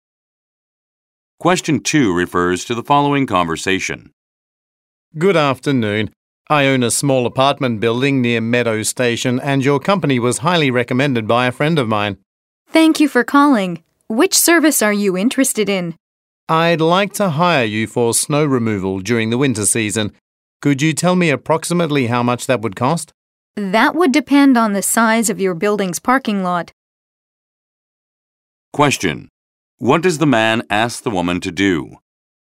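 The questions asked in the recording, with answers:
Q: What does the man ask the woman to do?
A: Give him an approximate cost (price estimate) for snow removal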